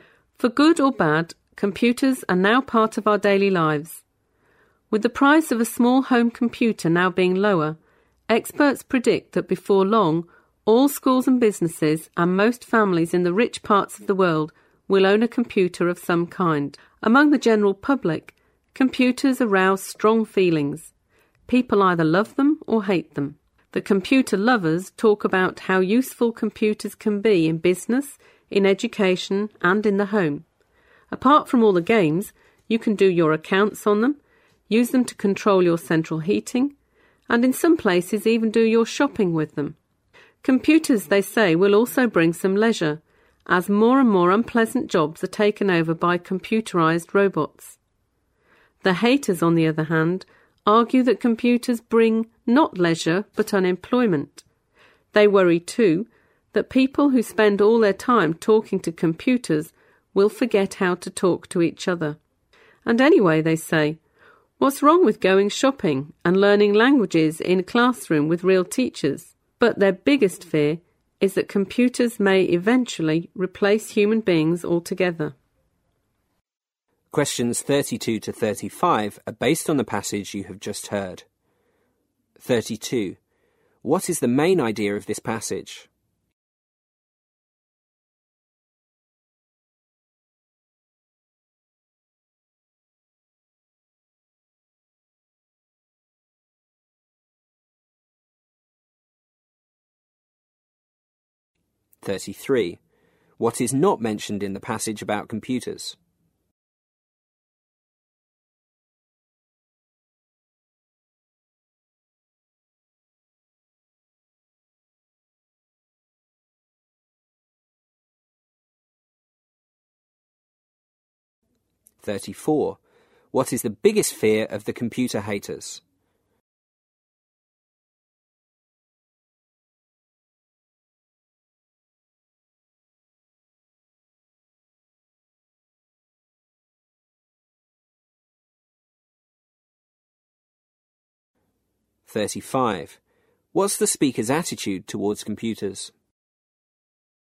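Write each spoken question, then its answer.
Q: What is the main idea of this passage?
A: People have strongly differing views about computers: some love them, others hate them.

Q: What is the biggest fear of the computer haters?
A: That computers may eventually replace human beings altogether.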